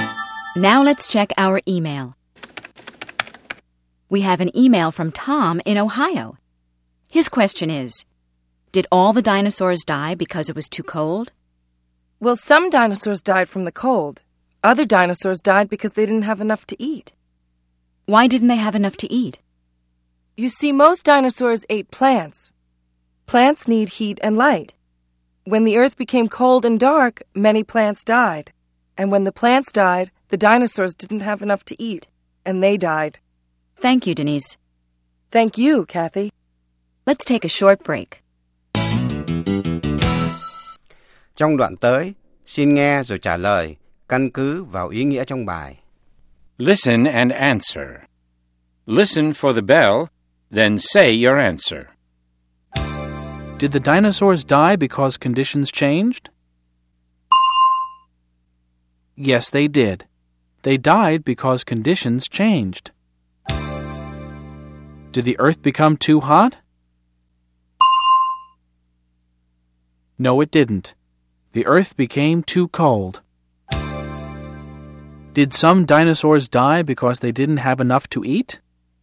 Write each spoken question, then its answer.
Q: Did the dinosaurs die because conditions changed?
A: Yes, they did. They died because conditions changed.

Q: Did some dinosaurs die because they didn't have enough to eat?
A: Yes, they did. Some dinosaurs didn't have enough plants to eat, so they died.